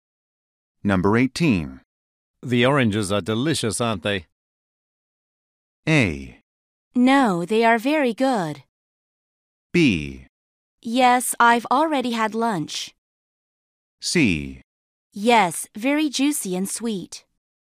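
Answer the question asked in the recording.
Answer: C: Yes, very juicy and sweet.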